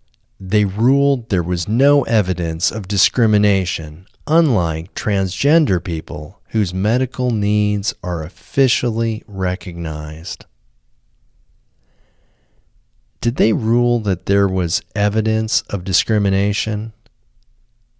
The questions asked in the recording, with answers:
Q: Did they rule that there was evidence of discrimination?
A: No, they didn't rule that there was evidence of discrimination.